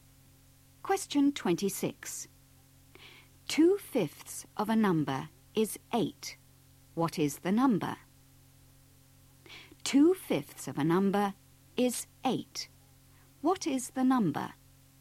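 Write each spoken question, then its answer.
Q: What is the number?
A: 20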